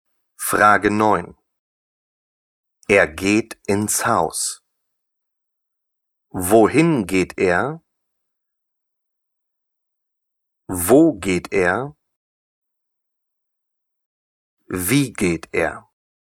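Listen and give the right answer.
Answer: Wohin geht er?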